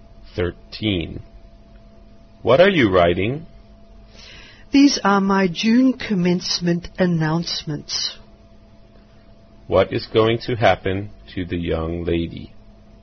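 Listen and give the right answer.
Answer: She will graduate in June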